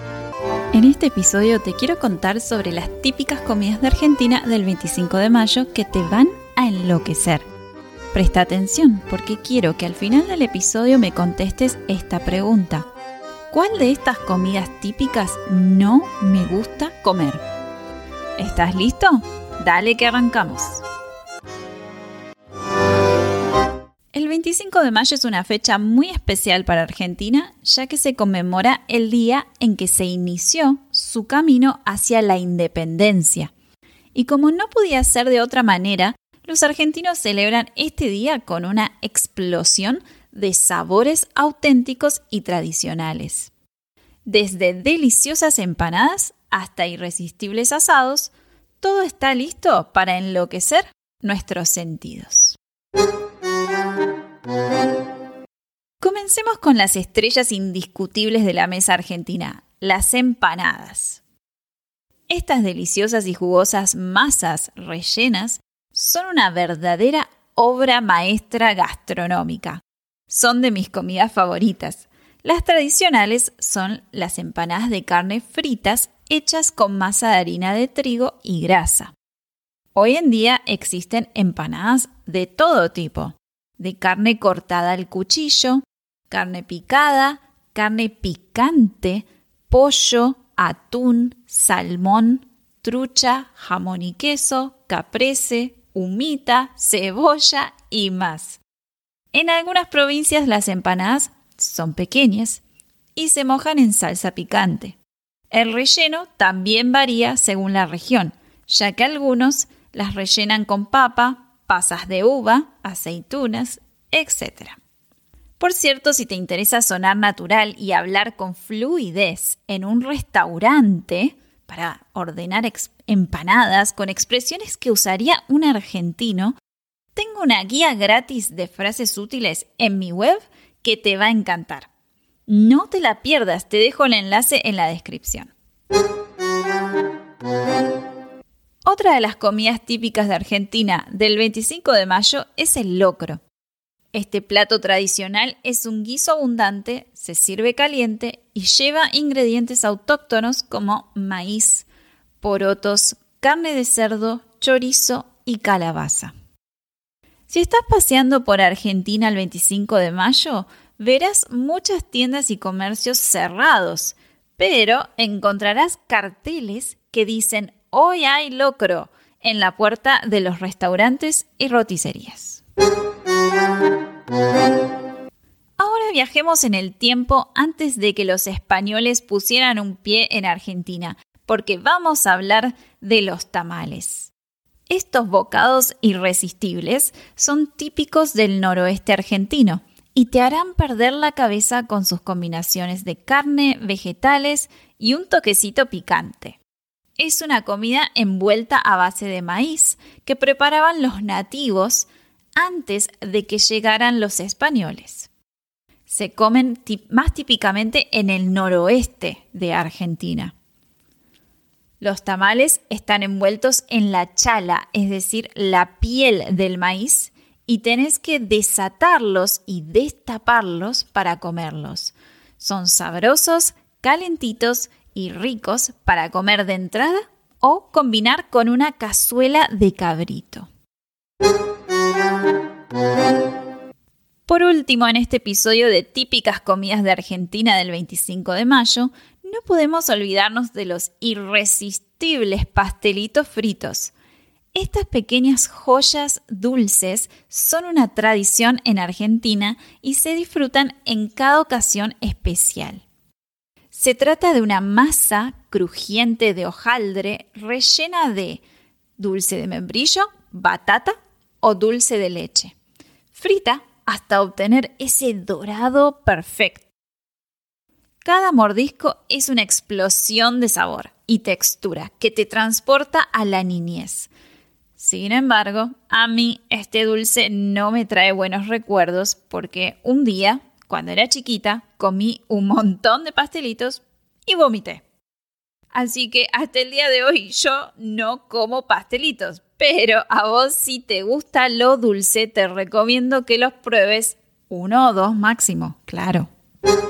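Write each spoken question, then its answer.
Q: ¿Cuál de estas comidas típicas no me gusta comer?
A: los pastelitos fritos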